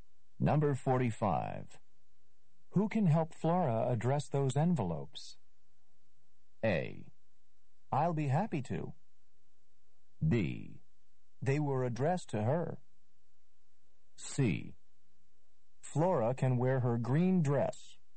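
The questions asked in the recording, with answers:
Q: Who can help Flora address those envelopes?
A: A: I'll be happy to.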